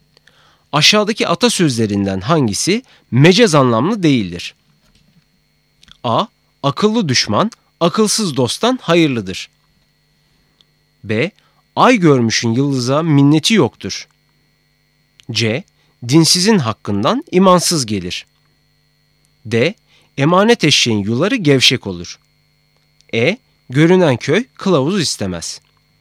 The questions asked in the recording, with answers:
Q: Aşağıdaki atasözlerinden hangisi mecaz anlamlı değildir?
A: Doğru cevap A, akıllı düşman, akılsız dosttan hayırlıdır.